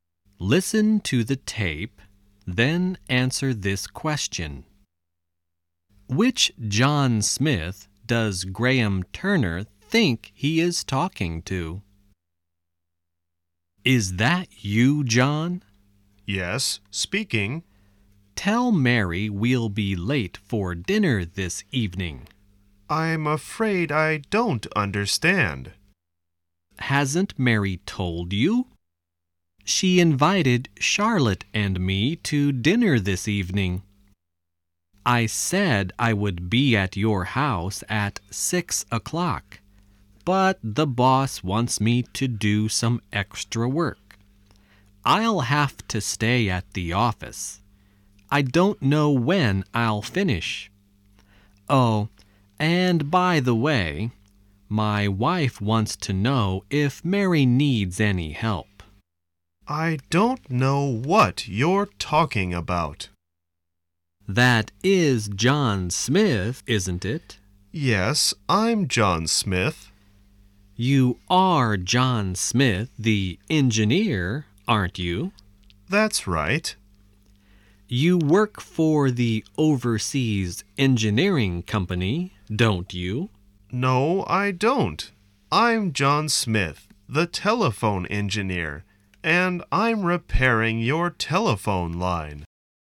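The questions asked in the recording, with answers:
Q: Which John Smith does Graham Turner think he is talking to?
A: John Smith the engineer who works for the Overseas Engineering Company (Mary's husband)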